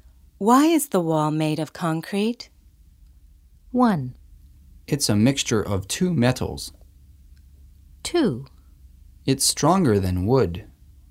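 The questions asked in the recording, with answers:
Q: Why is the wall made of concrete?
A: 2: It's stronger than wood.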